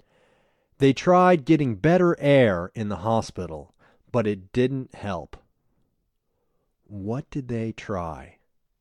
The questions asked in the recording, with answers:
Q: What did they try?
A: They tried getting better air in the hospital.